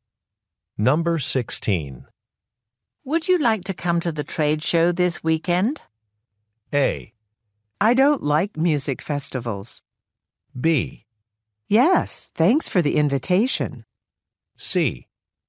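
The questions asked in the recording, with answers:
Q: Would you like to come to the trade show this weekend?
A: B: Yes, thanks for the invitation.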